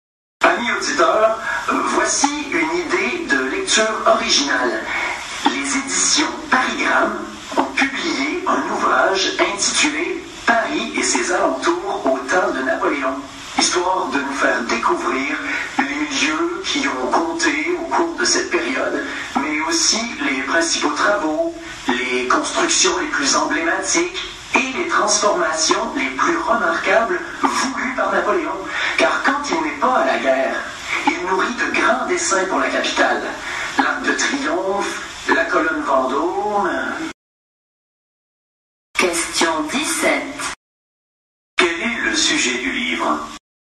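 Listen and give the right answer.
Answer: Paris et ses alentours au temps de Napoléon : les lieux, travaux et transformations voulus par Napoléon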